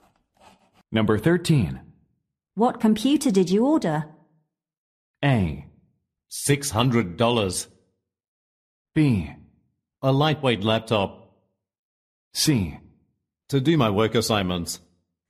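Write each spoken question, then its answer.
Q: What computer did you order?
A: B: A lightweight laptop.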